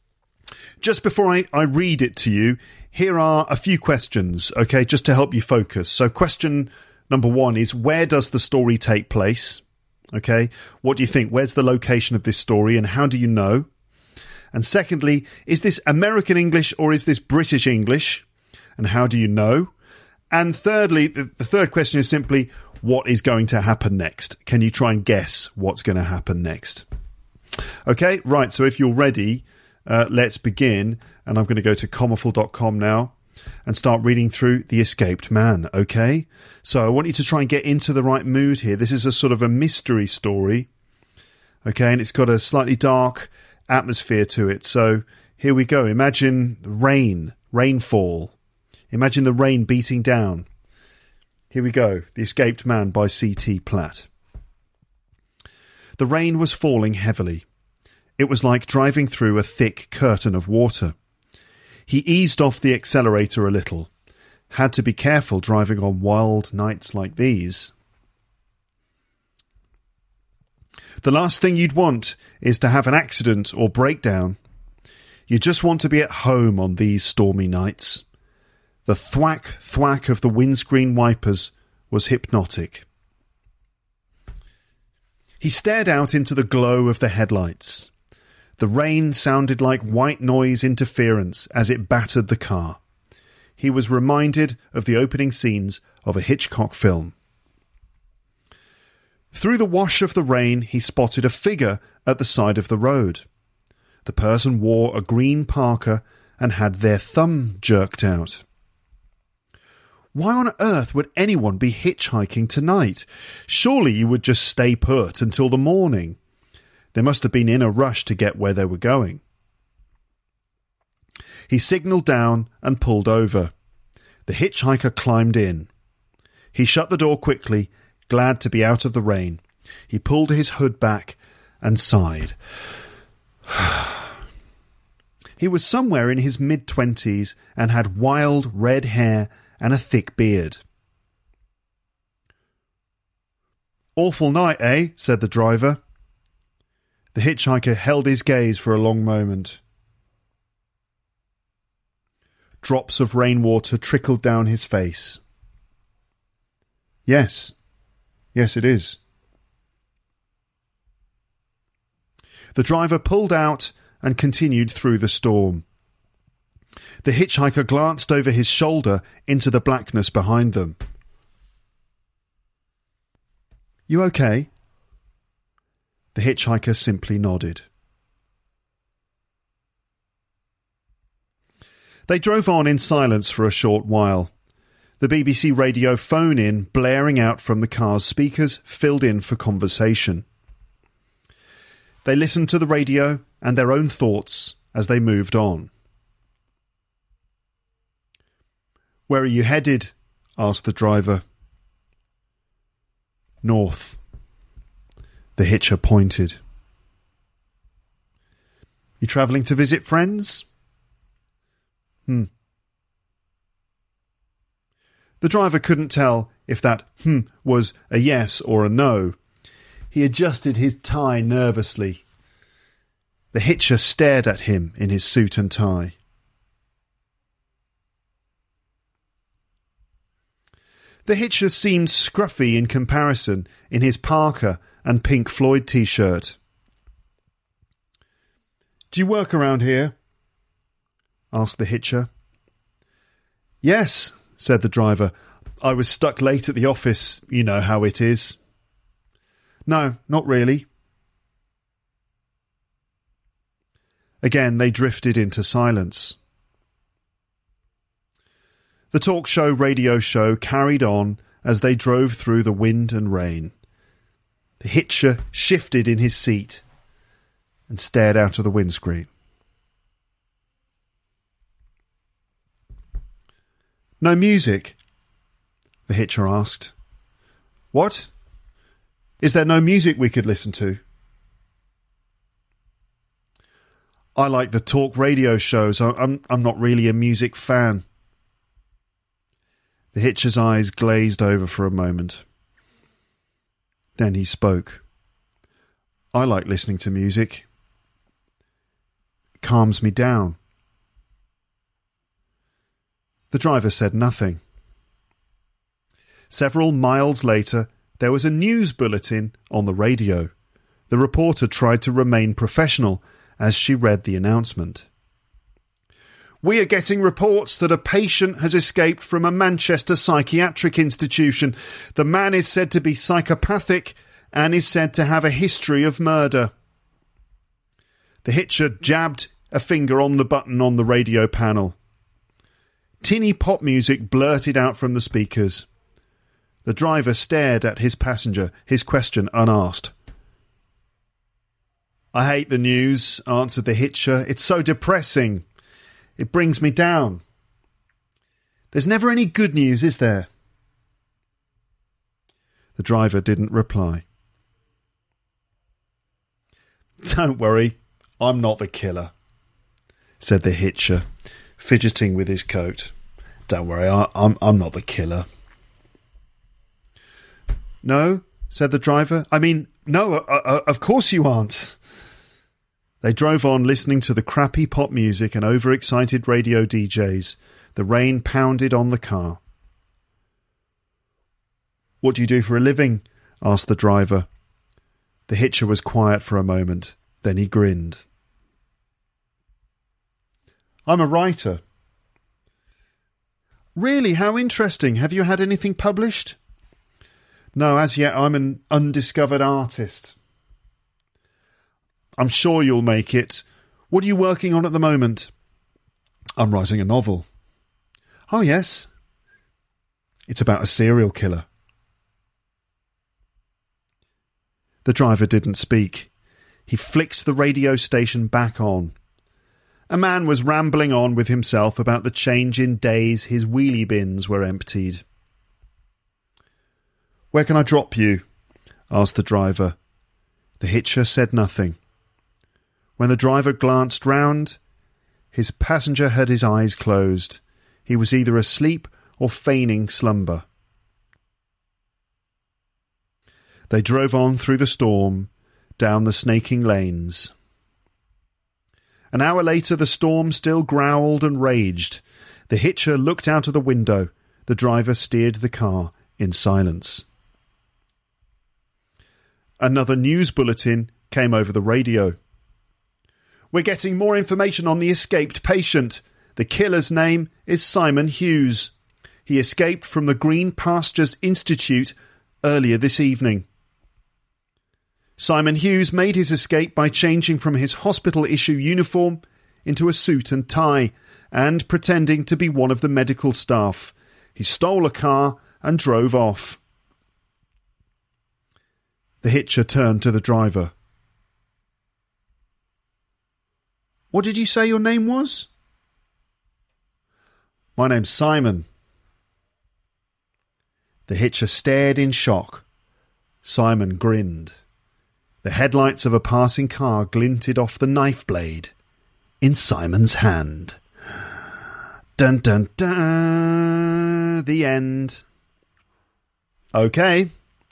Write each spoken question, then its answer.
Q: where does the story take place?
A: the answer to that question is that the story takes place somewhere in the UK.

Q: is this American English or is this British English?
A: British English or American English, it's British English